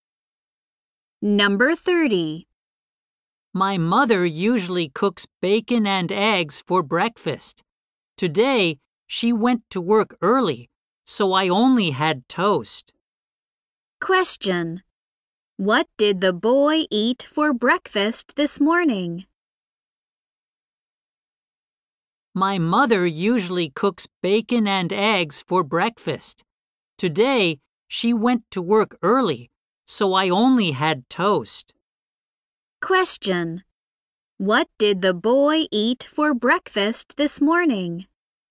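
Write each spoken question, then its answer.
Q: What did the boy eat for breakfast this morning?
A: Only toast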